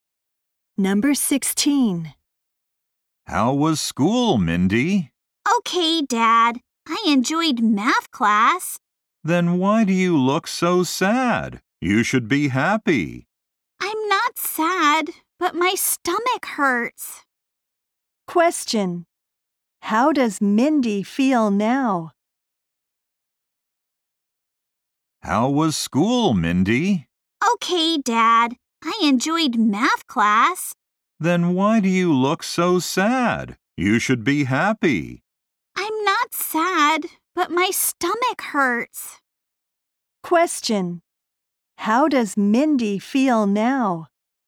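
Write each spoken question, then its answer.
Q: How does Mindy feel now?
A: Her stomach hurts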